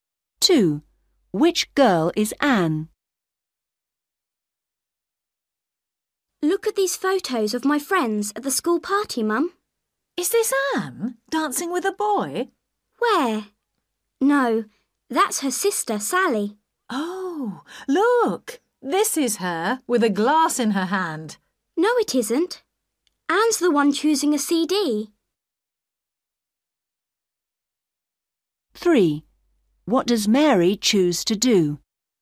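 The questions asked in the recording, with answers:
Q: Which girl is Anne?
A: The one choosing a CD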